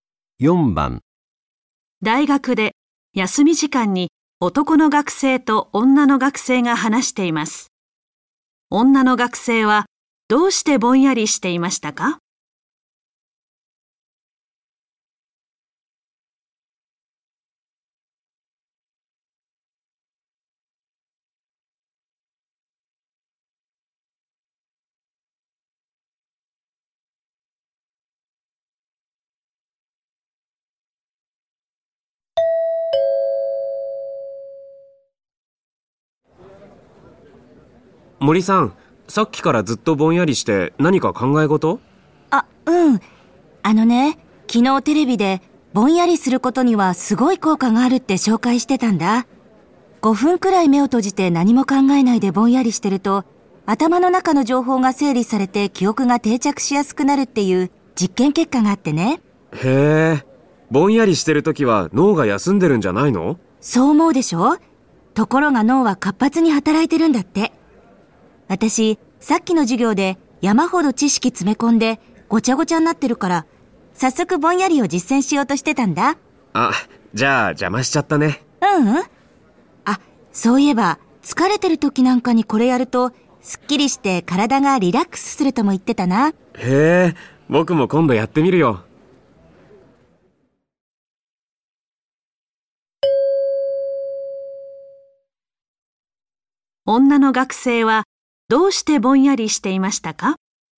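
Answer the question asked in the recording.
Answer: 授業で詰め込んだ知識を頭の中で整理するため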